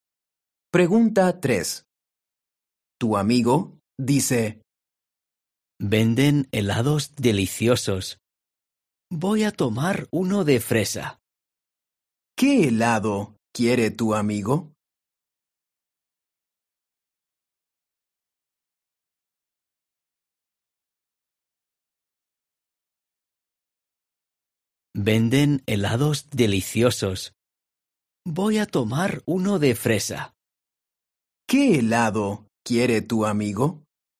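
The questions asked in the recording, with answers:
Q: ¿Qué helado quiere tu amigo?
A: Uno de fresa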